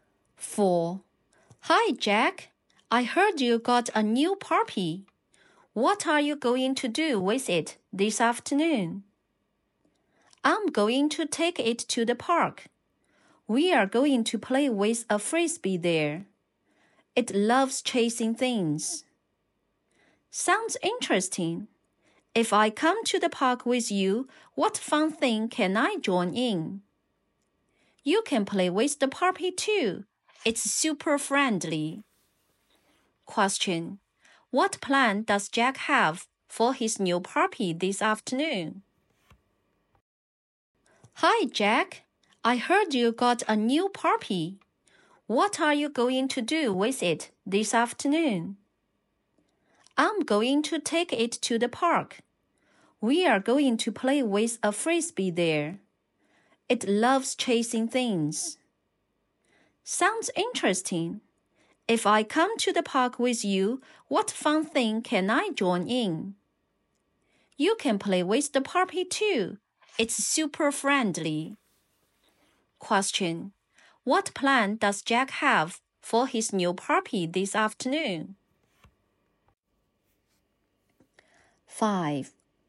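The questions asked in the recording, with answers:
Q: What plan does Jack have for his new puppy this afternoon?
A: Take it to the park and play with a frisbee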